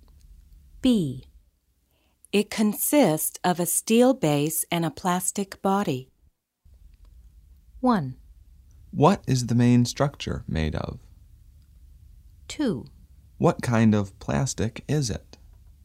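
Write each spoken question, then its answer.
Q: It consists of a steel base and a plastic body.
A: 1: What is the main structure made of?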